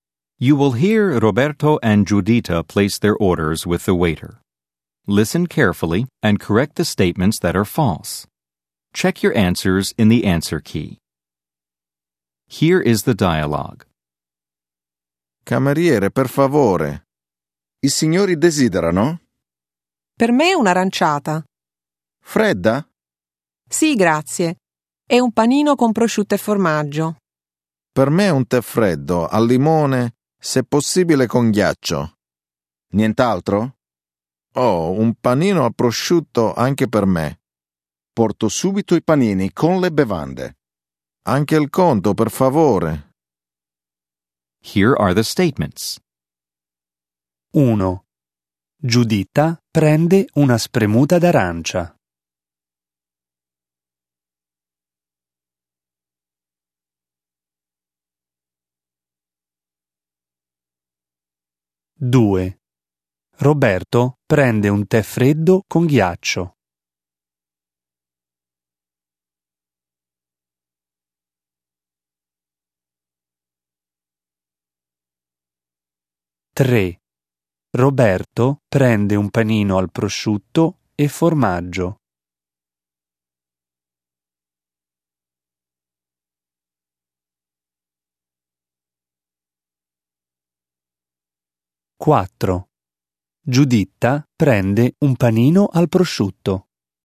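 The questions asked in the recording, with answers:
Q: Giuditta prende una spremuta d'arancia.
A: Falso: prende un'aranciata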